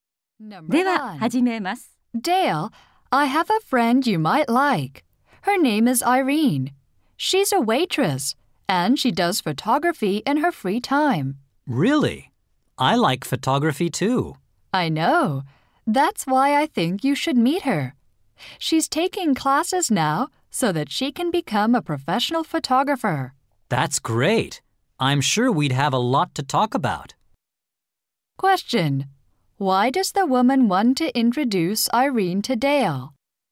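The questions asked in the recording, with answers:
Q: Why does the woman want to introduce Irene to Dale?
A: They both like photography.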